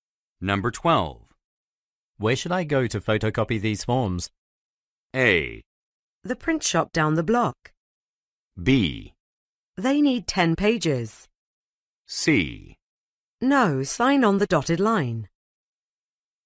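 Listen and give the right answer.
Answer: A: The print shop down the block.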